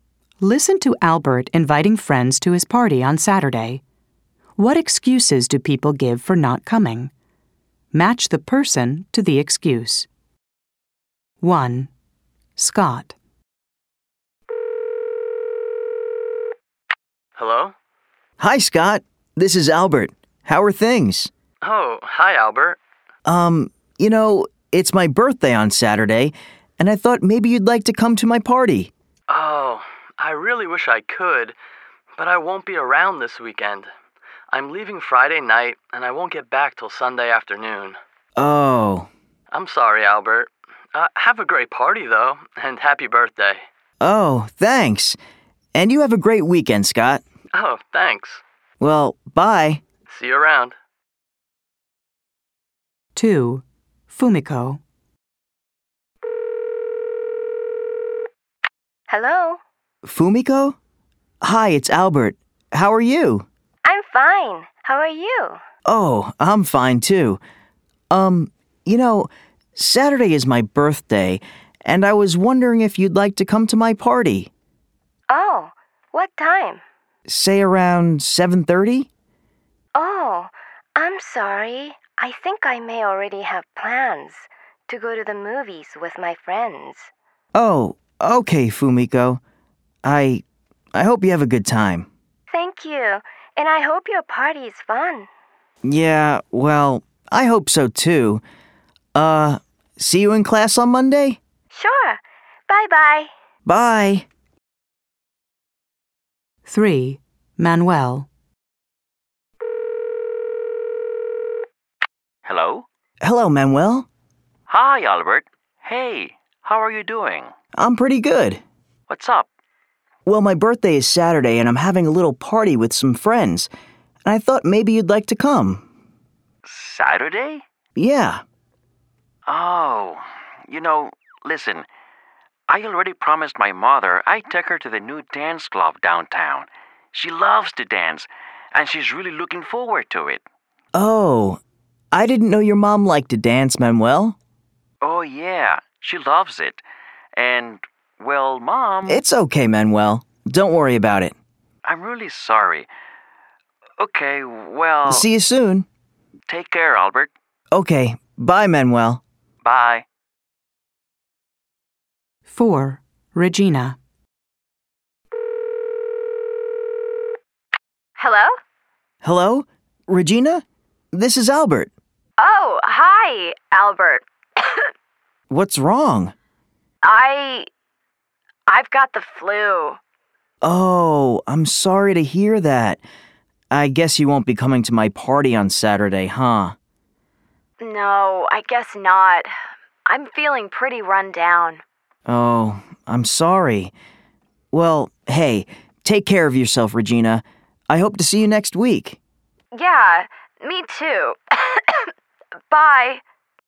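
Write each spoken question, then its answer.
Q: What excuses do people give for not coming?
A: Scott: he won't be around this weekend (away Friday night to Sunday afternoon)

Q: What excuses do people give for not coming?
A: Fumiko: she may already have plans to go to the movies with friends

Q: What excuses do people give for not coming?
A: Manuel: he promised to take his mother to the new dance club downtown

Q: What excuses do people give for not coming?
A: Regina: she has the flu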